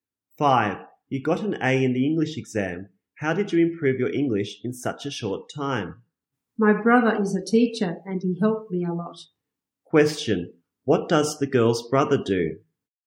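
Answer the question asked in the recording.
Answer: He is a teacher.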